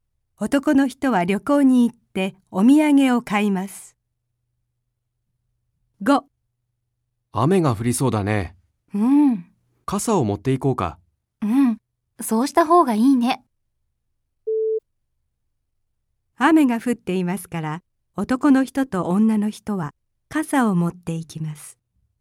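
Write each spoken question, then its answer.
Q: 雨が降っていますから、男の人と女の人は傘を持っていきます。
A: ×(まだ降っていない)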